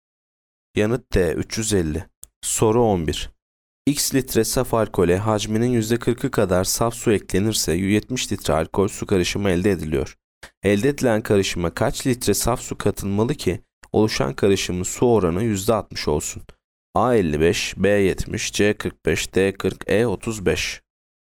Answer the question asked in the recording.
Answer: Yanıt A 55.